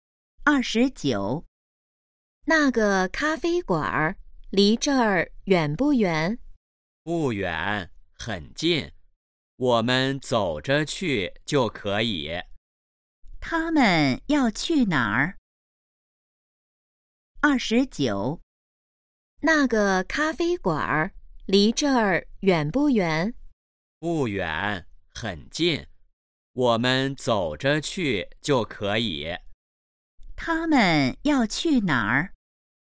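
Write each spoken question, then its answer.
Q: 他们要去哪儿?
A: 咖啡馆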